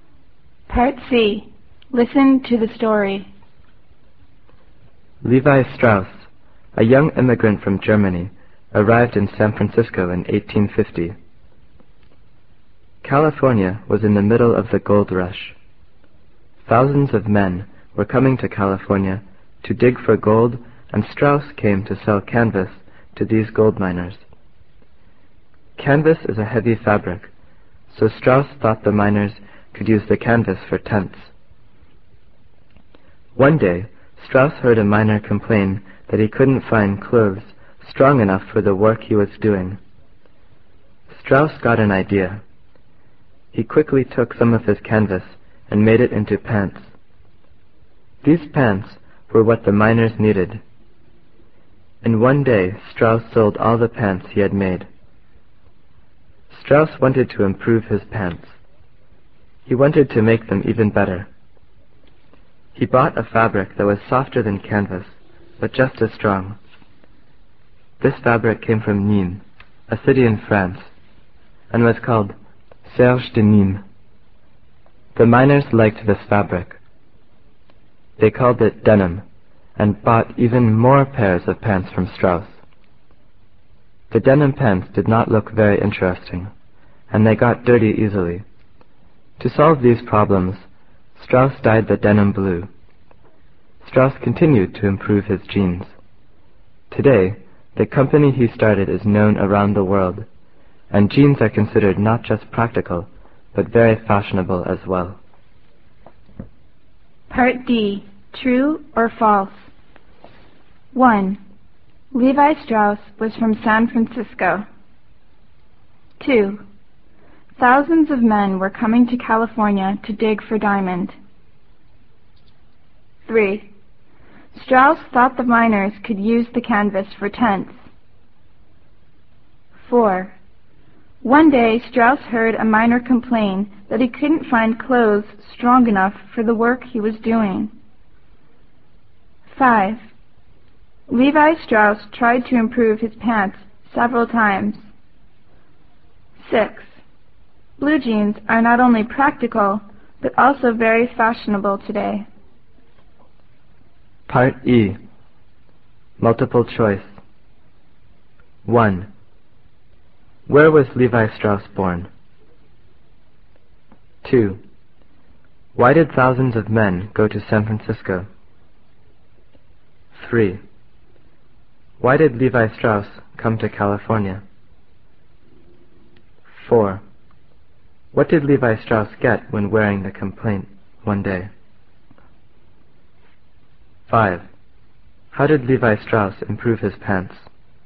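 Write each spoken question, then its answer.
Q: Levi Strauss was from San Francisco.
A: False

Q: Thousands of men were coming to California to dig for diamond.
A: False

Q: Strauss thought the miners could use the canvas for tents.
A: True

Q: One day, Strauss heard a miner complain that he couldn't find clothes strong enough for the work he was doing.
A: True

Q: Levi Strauss tried to improve his pants several times.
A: True

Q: Blue jeans are not only practical, but also very fashionable today.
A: True

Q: Where was Levi Strauss born?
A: Germany

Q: Why did thousands of men go to San Francisco?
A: To dig for gold

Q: Why did Levi Strauss come to California?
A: To sell canvas to the gold miners

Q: How did Levi Strauss improve his pants?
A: He used a softer but strong fabric (denim) and dyed it blue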